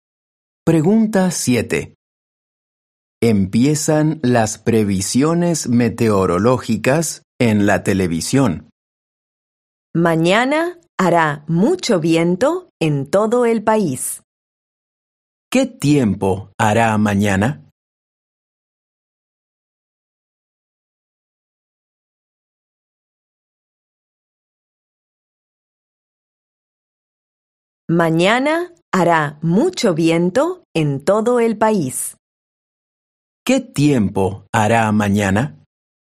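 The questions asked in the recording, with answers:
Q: ¿Qué tiempo hará mañana?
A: Hará mucho viento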